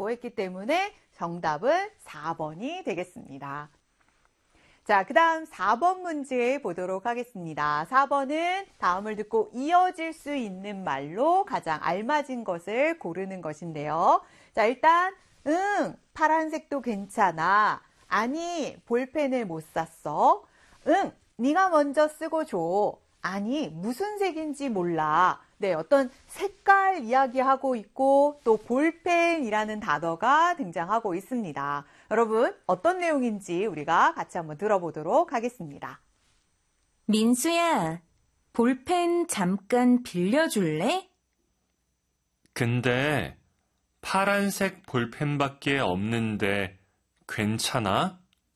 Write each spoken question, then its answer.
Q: 다음을 듣고 이어질 수 있는 말로 가장 알맞은 것을 고르는 것인데요.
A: 자, 그래서 정답은 네, 파란색도 괜찮아?라고 하는 것이 자연스럽게 이어질 수 있는 말이 되겠습니다.